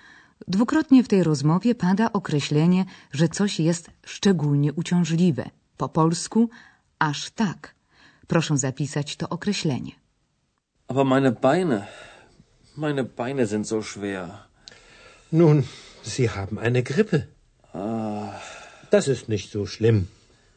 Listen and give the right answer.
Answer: So to niemieckie wyrażenie określające, że coś jest aż tak